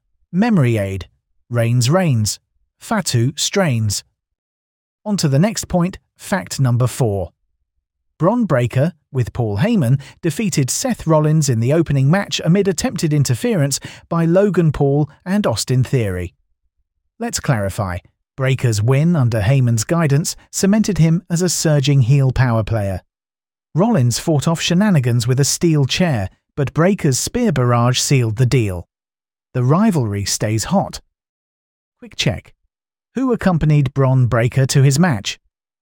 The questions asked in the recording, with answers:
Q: Who accompanied Bron Breakker to his match?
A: Correct answer, Paul Heyman.